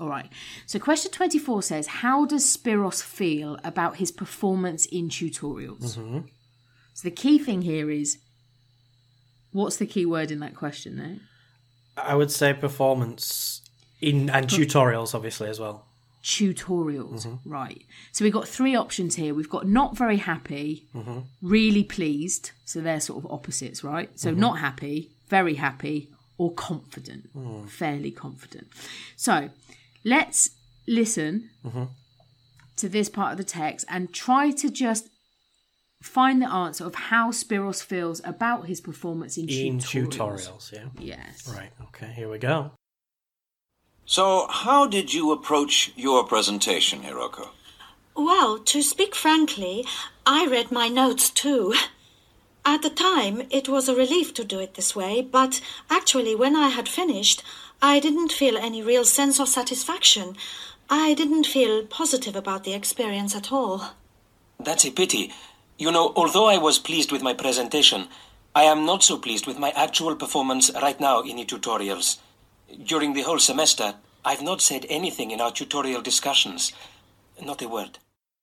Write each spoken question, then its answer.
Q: how does Spiros feel about his performance in tutorials?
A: Exactly. The answer is A. He's not very happy.